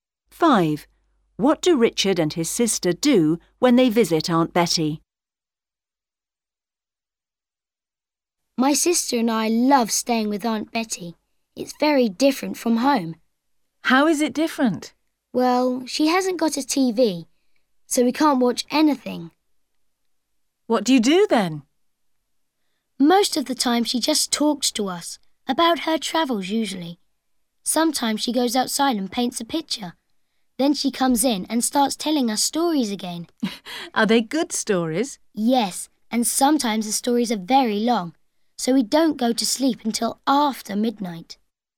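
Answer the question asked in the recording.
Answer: They listen to her stories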